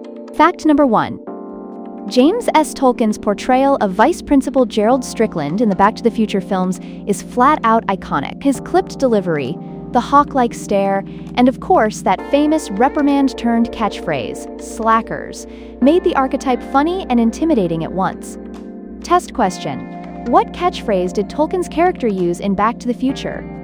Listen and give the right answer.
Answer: Correct answer. Slackers.